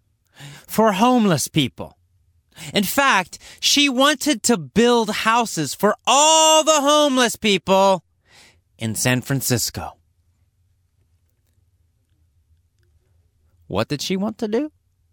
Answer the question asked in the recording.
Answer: She wanted to build houses for all the homeless people in San Francisco.